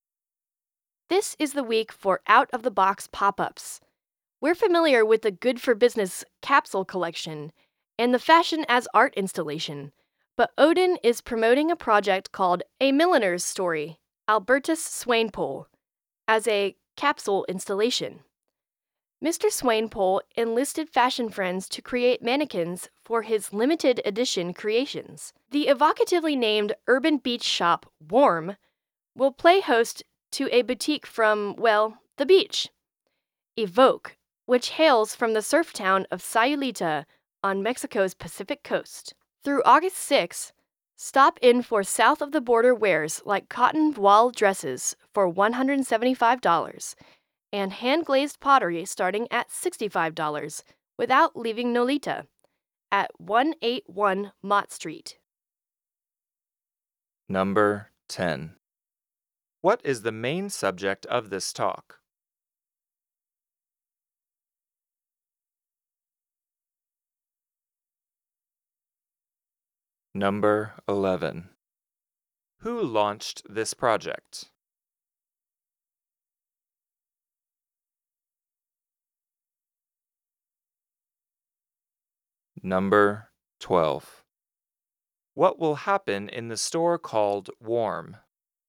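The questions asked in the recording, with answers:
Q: What is the main subject of this talk?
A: Unusual pop-up shops this week

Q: What will happen in the store called Warm?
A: It will host a pop-up boutique from Evoke, a beach shop from Sayulita, Mexico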